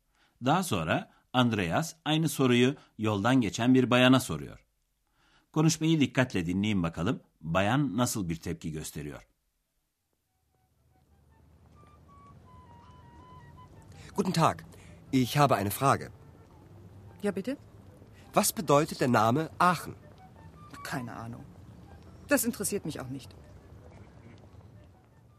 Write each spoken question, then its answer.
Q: Konuşmayı dikkatle dinleyin bakalım bayan nasıl bir tepki gösteriyor.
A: Bayan hiçbir fikrim yok diyor.